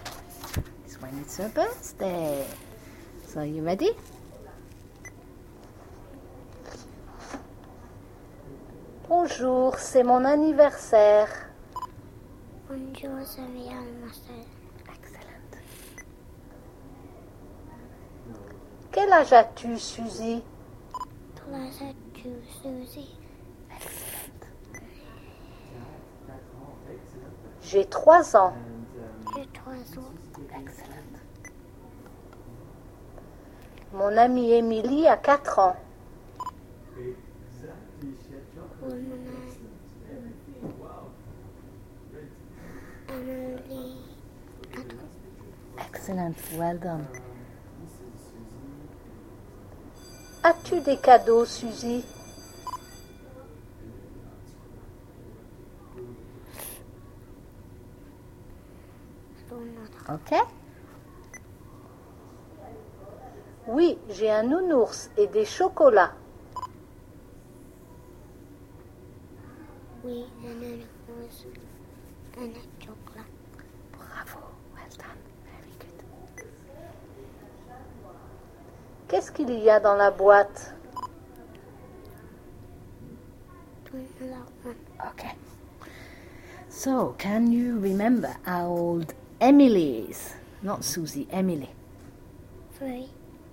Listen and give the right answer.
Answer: It says, mon amie Emily a 4 ans.